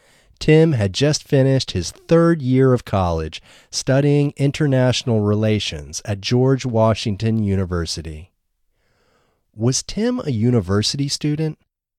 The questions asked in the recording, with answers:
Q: Was Tim a university student?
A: Yes, Tim was a university student.